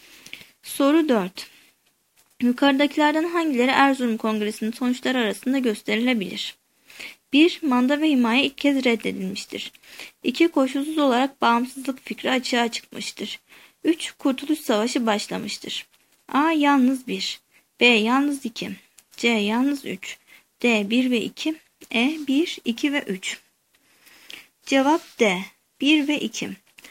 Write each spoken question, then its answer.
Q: Yukarıdakilerden hangileri Erzurum Kongresi'nin sonuçları arasında gösterilebilir?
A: Cevap D. 1 ve 2.